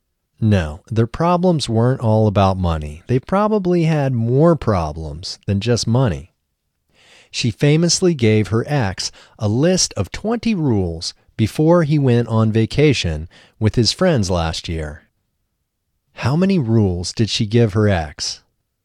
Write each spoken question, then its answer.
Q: How many rules did she give her ex?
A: She gave her ex 20 rules.